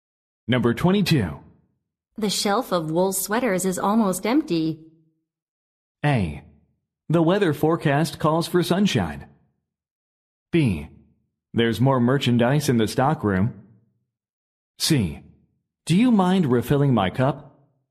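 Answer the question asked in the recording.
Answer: B: There's more merchandise in the stockroom.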